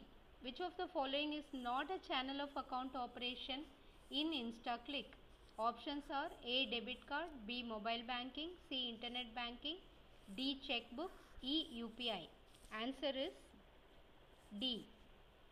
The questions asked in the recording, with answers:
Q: Which of the following is not a channel of account operation in InstaClick?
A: Answer is D.